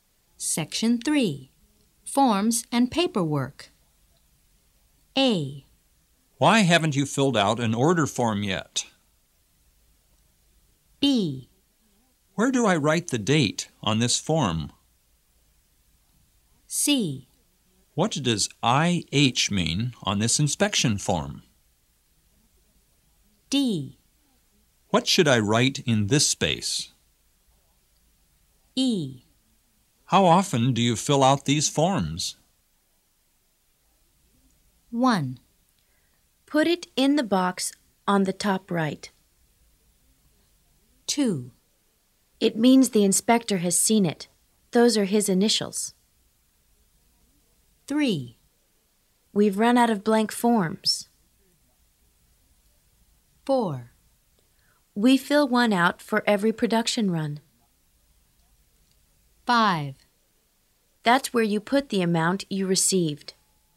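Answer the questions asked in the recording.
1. B: Where do I write the date on this form?
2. C: What does IH mean on this inspection form?
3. A: Why haven't you filled out an order form yet?
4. E: How often do you fill out these forms?
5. D: What should I write in this space?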